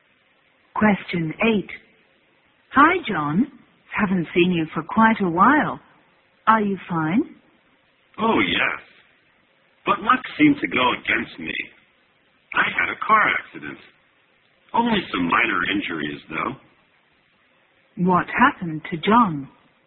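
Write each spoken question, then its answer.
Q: What happened to John?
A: He had a car accident but was only slightly injured.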